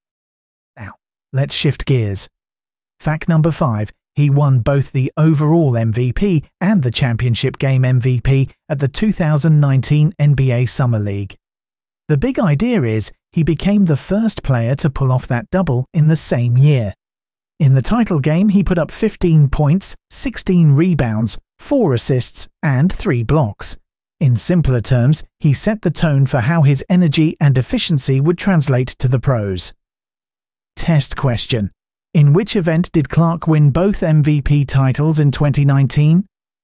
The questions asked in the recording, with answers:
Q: In which event did Clark win both MVP titles in 2019?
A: Correct answer. NBA Summer League.